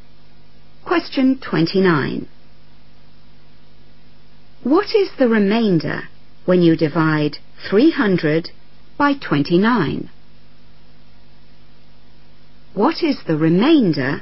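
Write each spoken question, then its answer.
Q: What is the remainder when you divide 300 by 29?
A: 10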